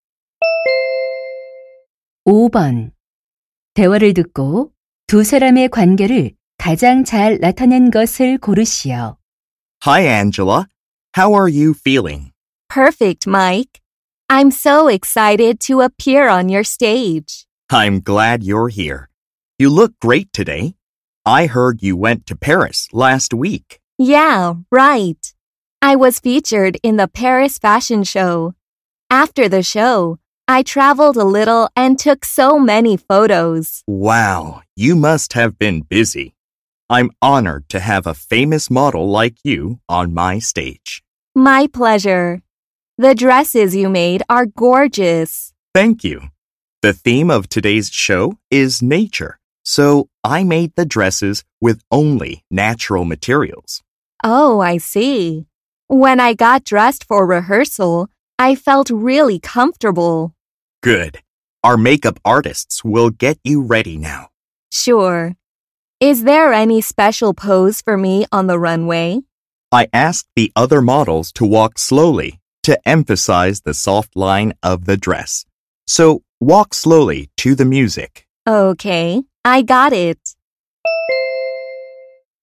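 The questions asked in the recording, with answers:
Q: 대화를 듣고 두 사람의 관계를 가장 잘 나타낸 것을 고르시오.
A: 패션 디자이너 — 모델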